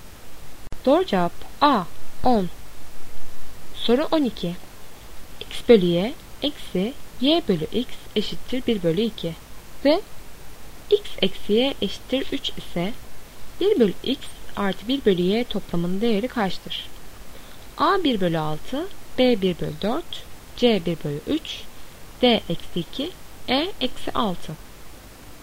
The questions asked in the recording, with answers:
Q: X bölü y eksi y bölü x eşittir 1 bölü 2 ve x eksi y eşittir 3 ise 1 bölü x artı 1 bölü y toplamının değeri kaçtır?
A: Doğru cevap A 1 bölü 6.